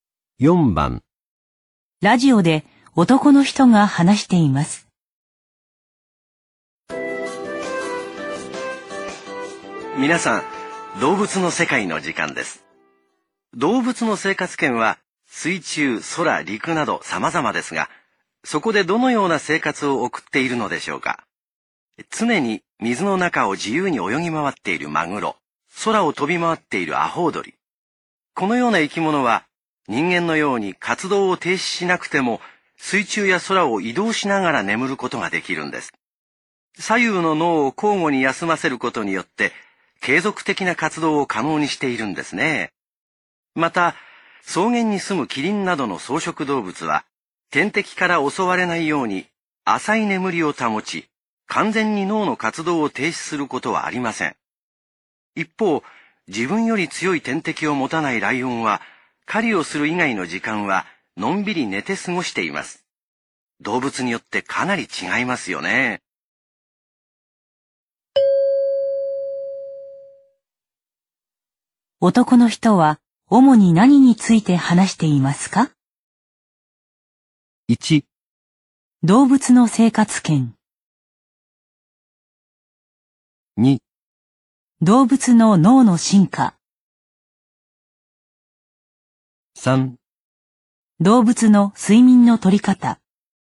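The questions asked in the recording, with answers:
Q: 男の人は主に何に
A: 3: 動物の睡眠の取り方。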